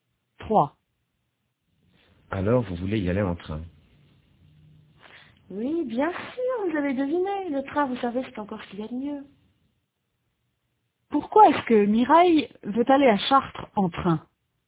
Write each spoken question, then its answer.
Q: Pourquoi est-ce que Mireille veut aller à Chartres en train?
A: Parce que c'est ce qu'il y a de mieux.